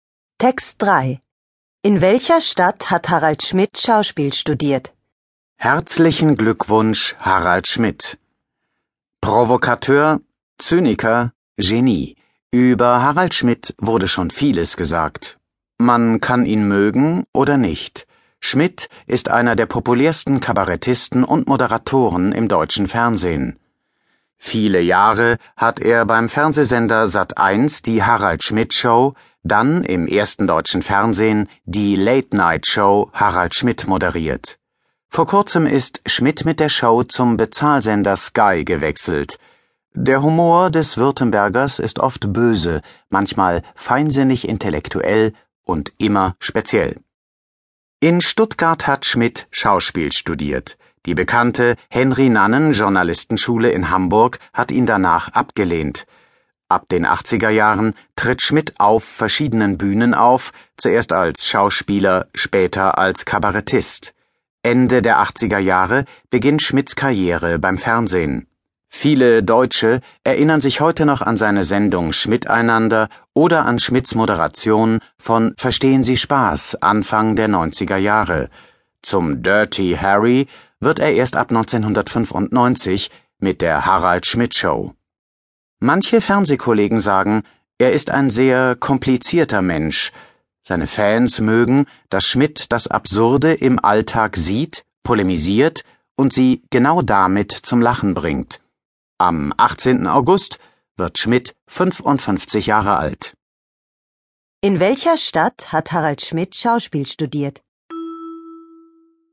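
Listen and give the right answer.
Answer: In Stuttgart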